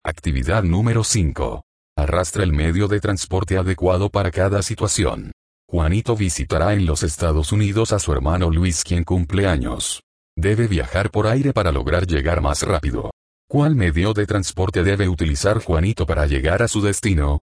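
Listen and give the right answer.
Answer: El avión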